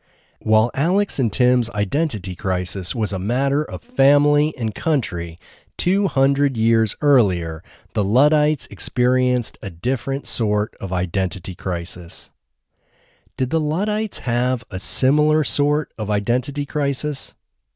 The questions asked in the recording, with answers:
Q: Did the Luddites have a similar sort of identity crisis?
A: No, the Luddites didn't have a similar sort of identity crisis.